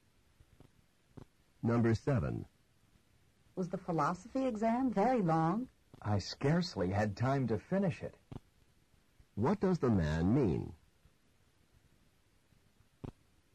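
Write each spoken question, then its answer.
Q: What does the man mean?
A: The exam was long; he barely had time to finish.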